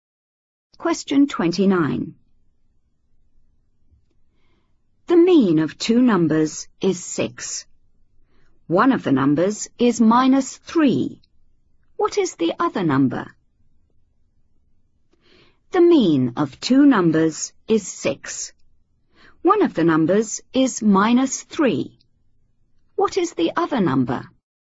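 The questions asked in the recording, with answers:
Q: What is the other number?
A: 15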